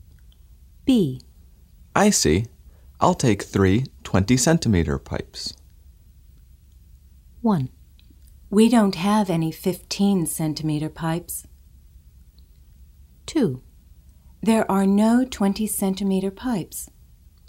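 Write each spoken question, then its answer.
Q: I see. I'll take 3 20-centimeter pipes.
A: 1: We don't have any 15-centimeter pipes.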